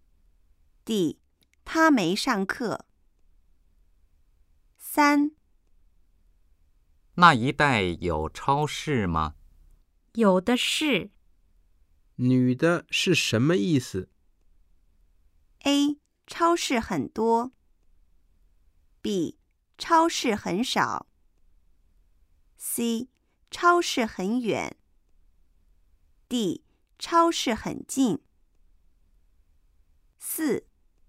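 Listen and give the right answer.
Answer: A: 超市很多。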